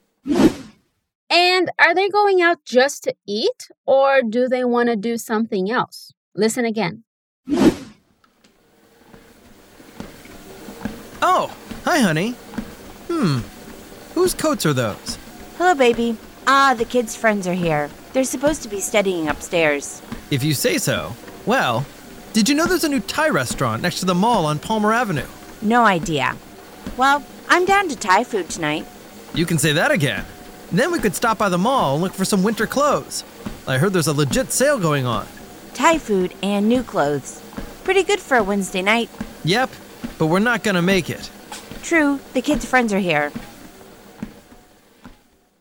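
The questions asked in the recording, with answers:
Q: And are they going out just to eat, or do they want to do something else?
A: They also want to go to the mall to look for winter clothes on sale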